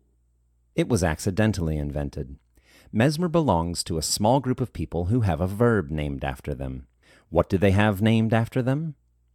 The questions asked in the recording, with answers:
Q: What do they have named after them?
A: They have a verb named after them.